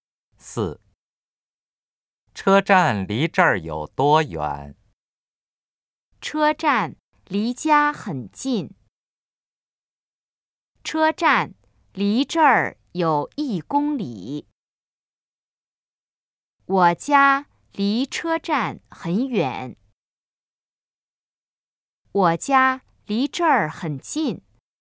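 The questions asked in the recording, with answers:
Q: 车站离这儿有多远?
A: B: 车站离这儿有1公里。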